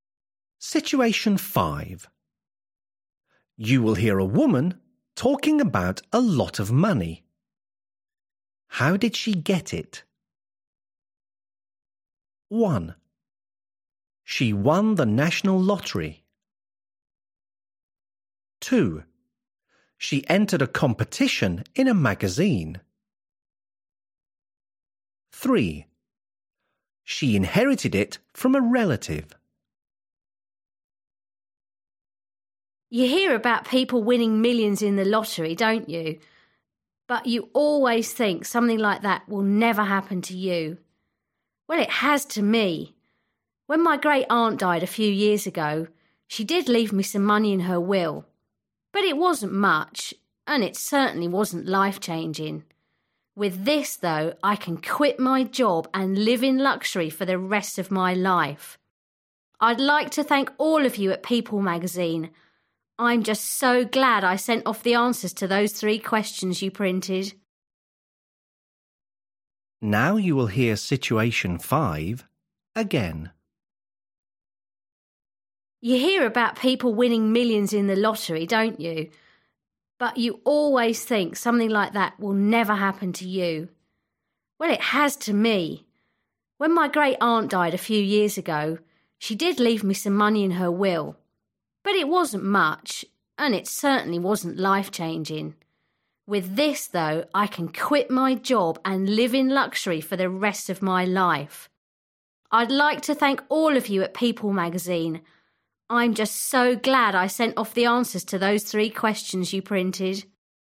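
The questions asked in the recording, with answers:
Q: How did she get it?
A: 2: She entered a competition in a magazine.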